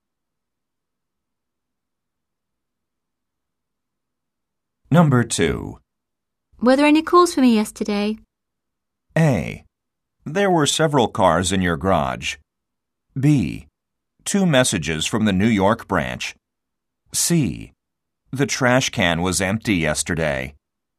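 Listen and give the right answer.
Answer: B: Two messages from the New York branch.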